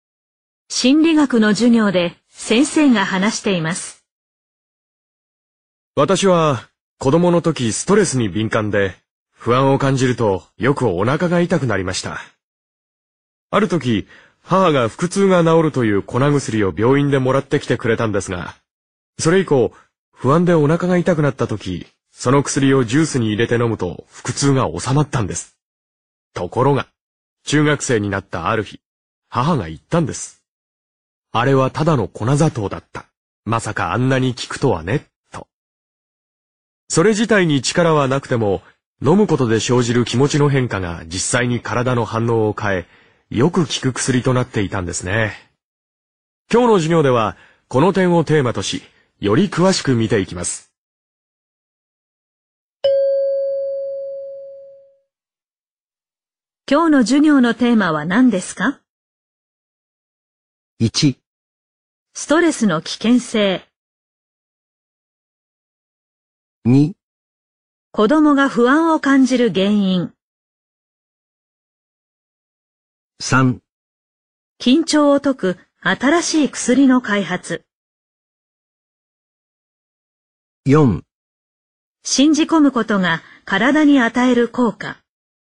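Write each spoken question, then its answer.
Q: 今日の授業のテーマは何ですか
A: 4: 信じ込むことが体に与える効果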